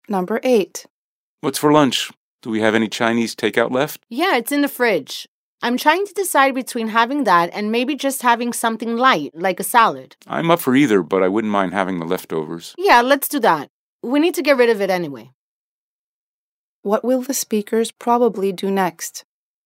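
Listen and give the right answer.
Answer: Eat the leftover Chinese takeout for lunch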